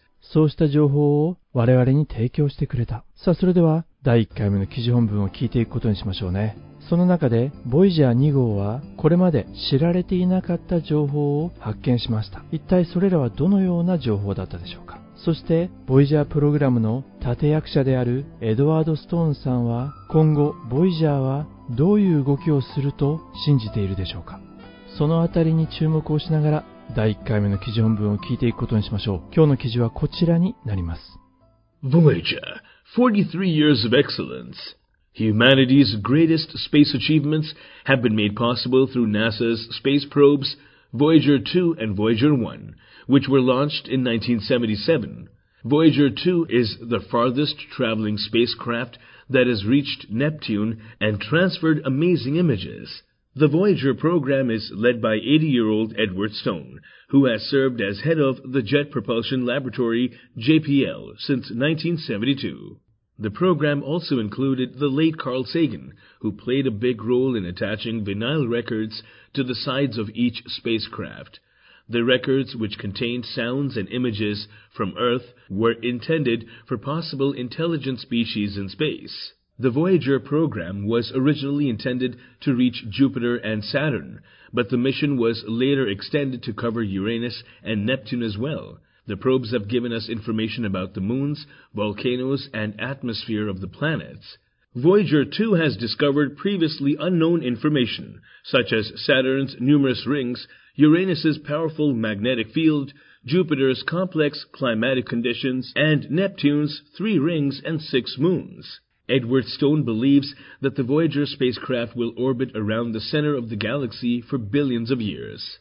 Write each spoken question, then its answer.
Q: その中で、Voyager 2号は、これまで知られていなかった情報を発見しました。一体それらはどのような情報だったでしょうか。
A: Voyager 2 has discovered previously unknown information such as Saturn's numerous rings, Uranus's powerful magnetic fieldJupiter's complex climatic conditions and Neptune's three rings and six moons.